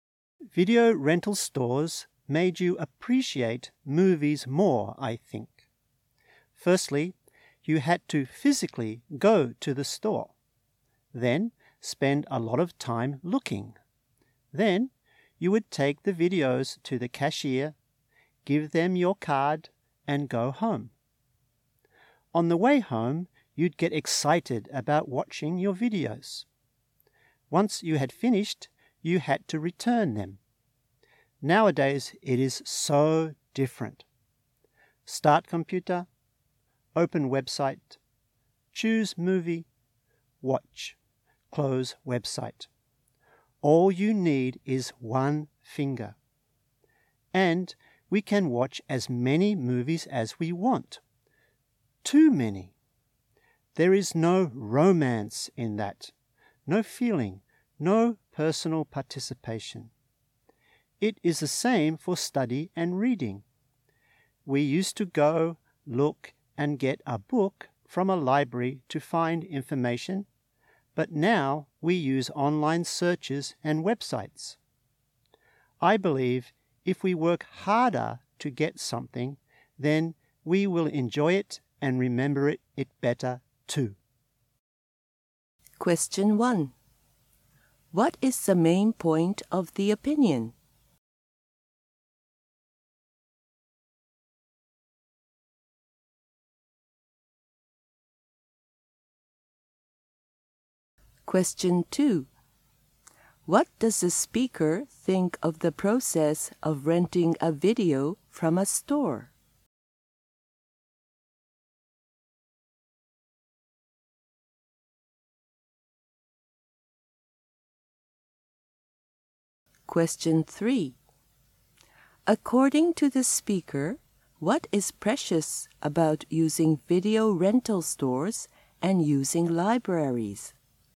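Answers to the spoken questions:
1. Working harder to get something makes us enjoy and remember it better
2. It made you appreciate movies more and get excited
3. Personal participation and effort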